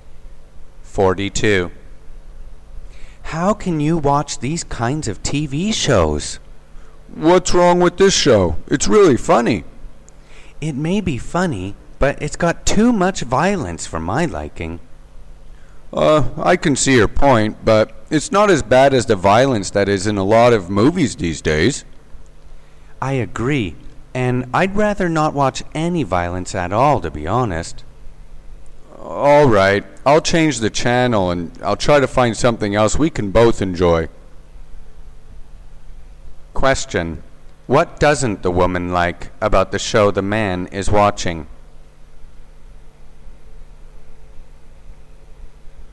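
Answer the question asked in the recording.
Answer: It has too much violence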